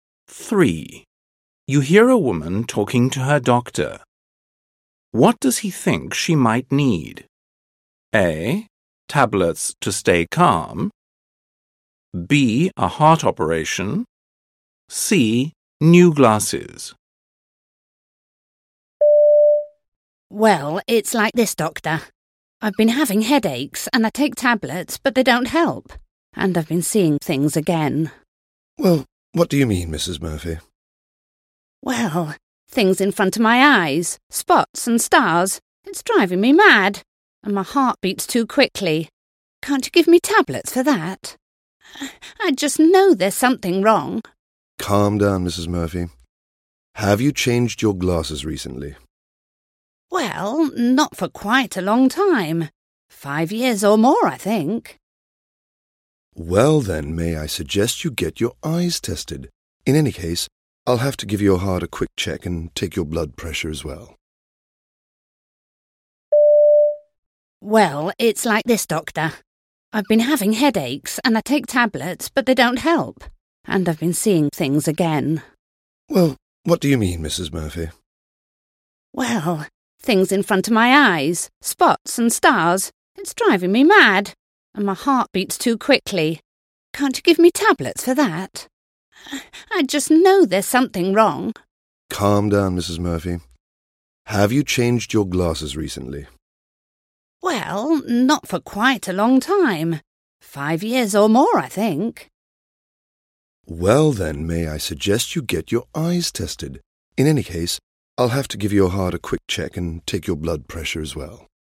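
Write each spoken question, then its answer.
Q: What does he think she might need?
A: C: New glasses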